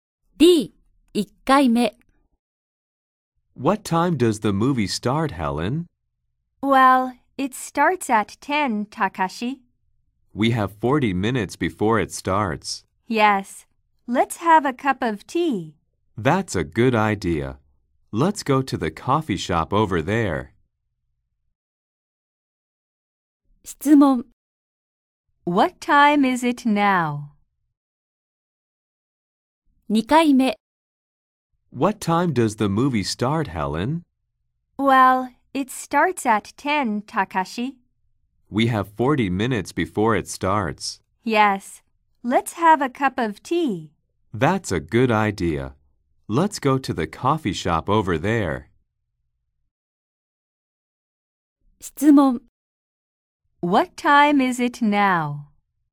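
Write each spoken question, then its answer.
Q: What time is it now?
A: 9:20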